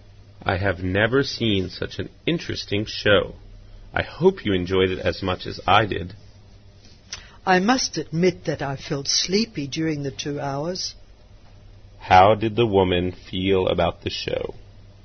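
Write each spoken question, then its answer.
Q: How did the woman feel about the show?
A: She found it boring; she felt sleepy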